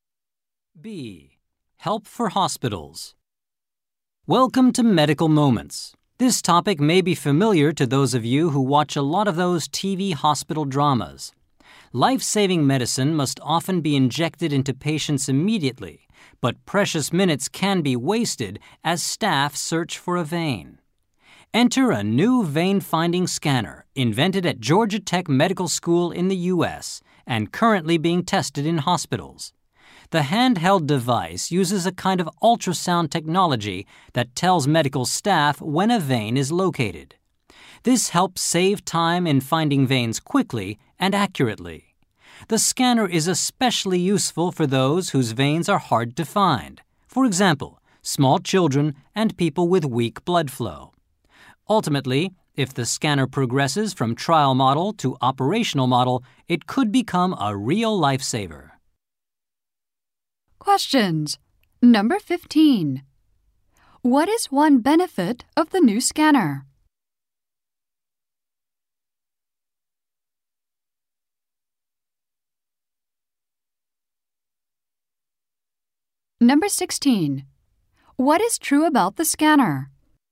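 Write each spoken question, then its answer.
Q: What is one benefit of the new scanner?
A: It helps staff find veins quickly and accurately.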